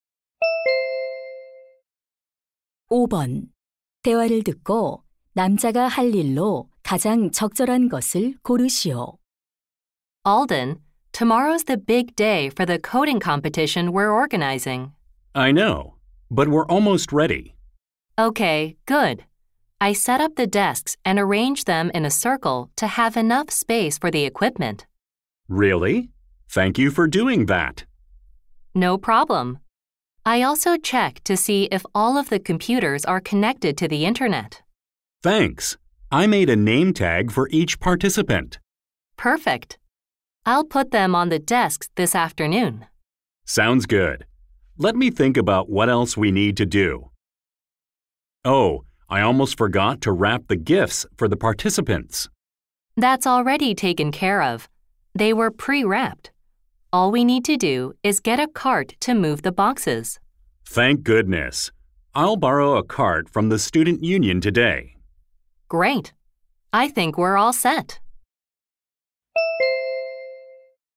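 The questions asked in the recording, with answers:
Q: 대화를 듣고 남자가 할 일로 가장 적절한 것을 고르시오.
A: 학생회에서 카트 빌리기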